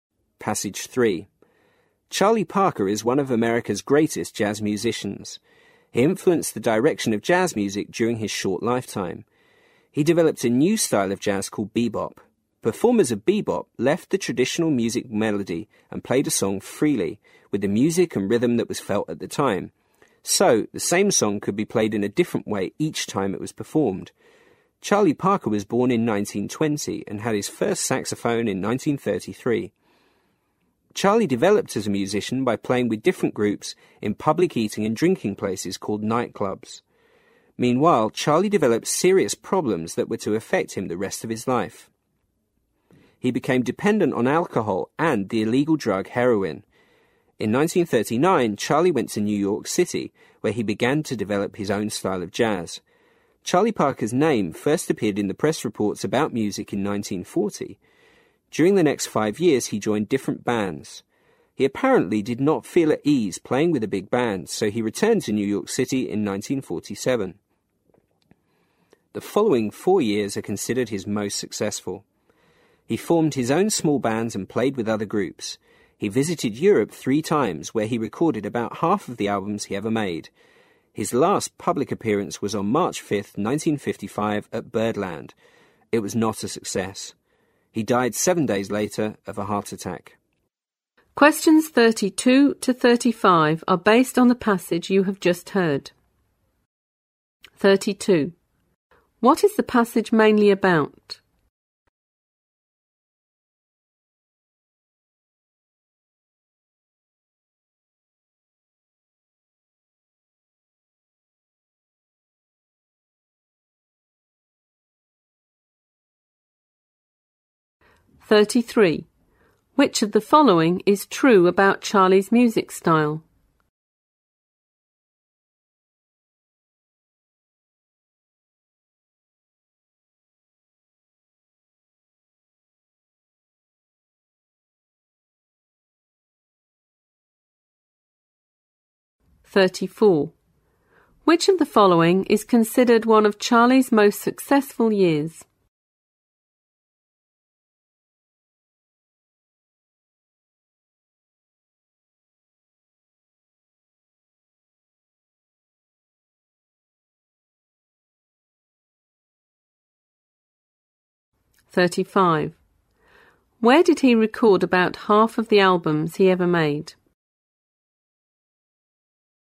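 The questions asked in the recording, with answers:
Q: What is the passage mainly about?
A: The life and music career of jazz musician Charlie Parker

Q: Where did he record about half of the albums he ever made?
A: In Europe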